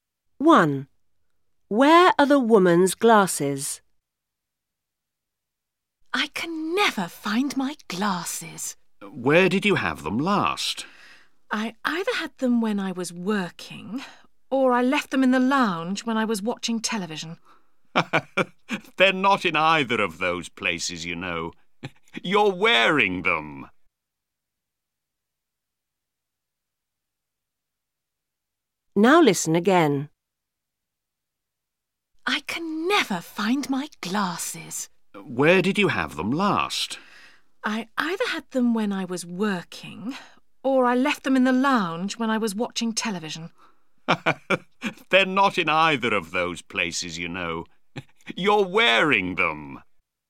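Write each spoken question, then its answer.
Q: Where are the woman's glasses?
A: She's wearing them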